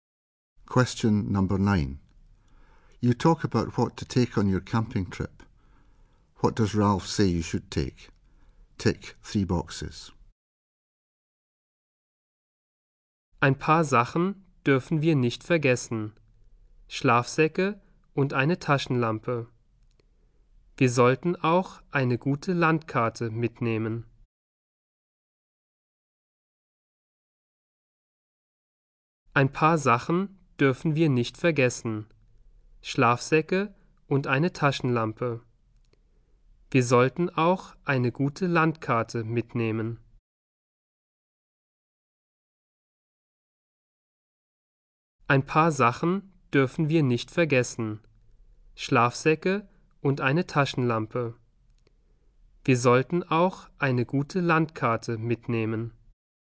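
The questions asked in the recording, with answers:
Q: What does Ralph say you should take?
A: Sleeping bags, a torch and a map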